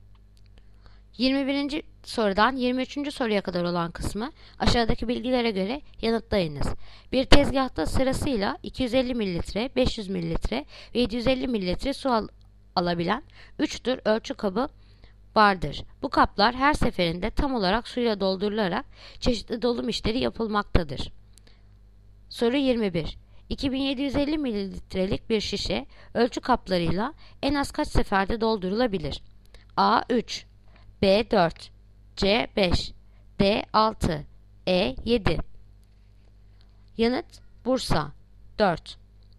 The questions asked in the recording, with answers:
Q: 2750 mililitrelik bir şişe ölçü kaplarıyla en az kaç seferde doldurulabilir?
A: Yanıt Bursa 4.